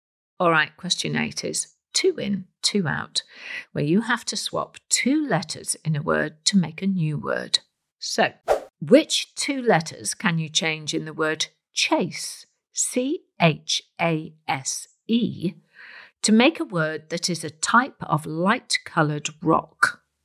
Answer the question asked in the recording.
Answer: if you change the letter S for a letter L and the letter E to a K, you get chalk.